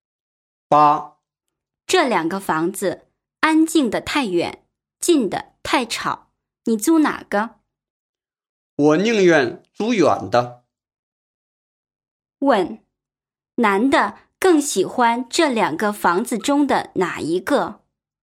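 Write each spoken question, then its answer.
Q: 问,男的更喜欢这两个房子中的哪一个?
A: 远的那个(安静的)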